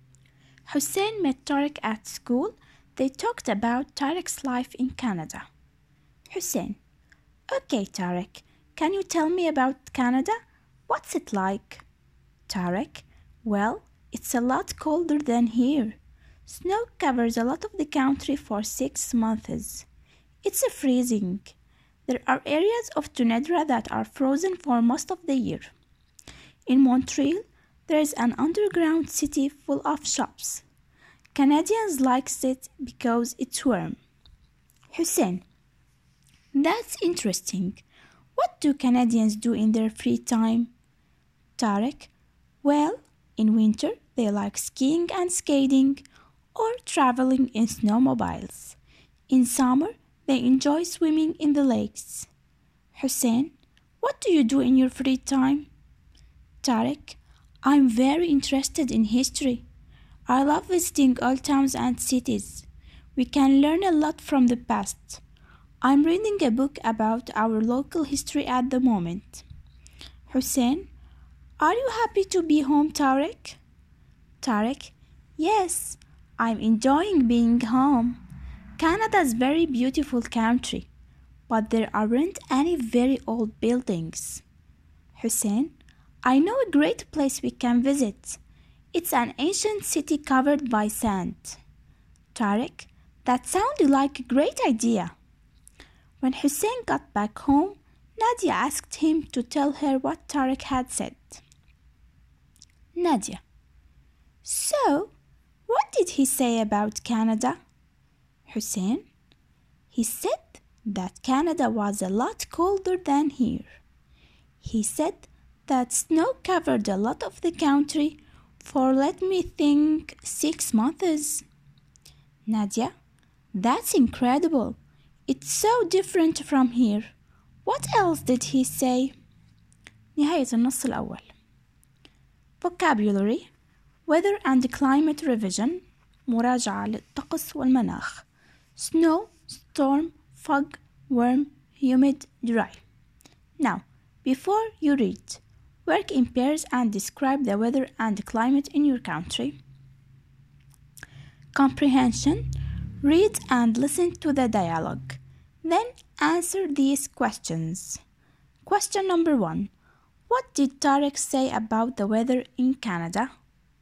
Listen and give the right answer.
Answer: It's colder than Syria. Snow covers a lot of the country for 6 months. It's freezing.